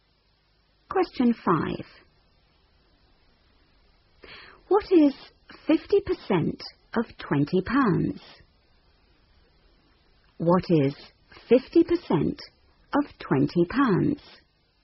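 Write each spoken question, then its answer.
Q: What is 50% of £20?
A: £10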